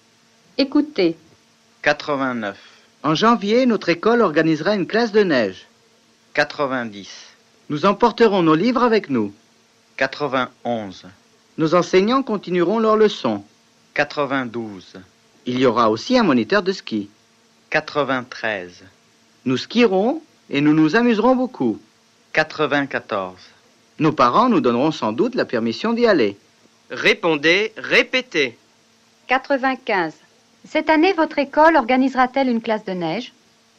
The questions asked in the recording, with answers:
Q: Cette année, votre école organisera-t-elle une classe de neige?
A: Oui, en janvier, notre école organisera une classe de neige.